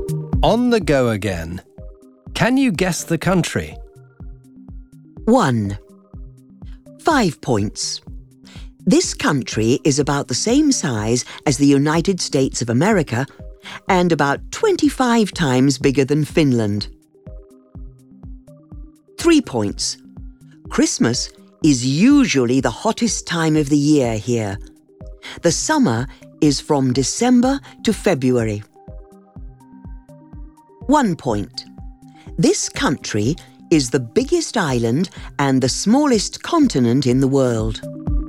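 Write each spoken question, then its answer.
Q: Can you guess the country?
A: Australia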